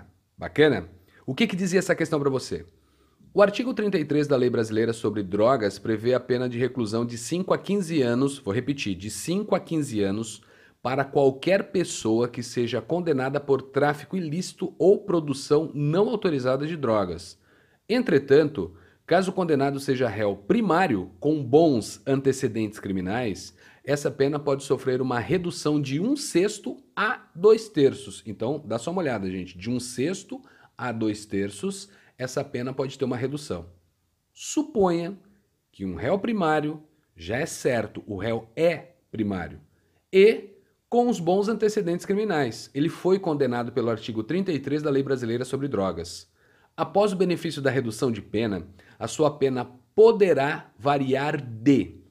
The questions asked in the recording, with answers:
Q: Após o benefício da redução de pena, a sua pena poderá variar de.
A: Nós podemos ter uma variação de um ano e oito meses a 12 anos e seis meses.